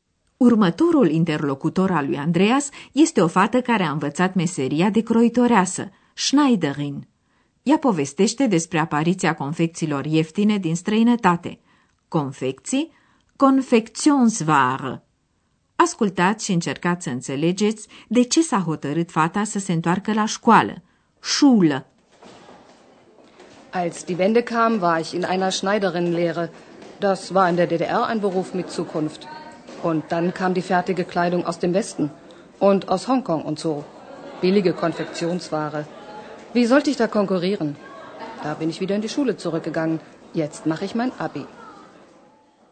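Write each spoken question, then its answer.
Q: Ascultați și încercați să înțelegeți de ce s-a hotărât fata să se întoarcă la școală.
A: Nu putea concura cu confecțiile ieftine din vest și din Hong Kong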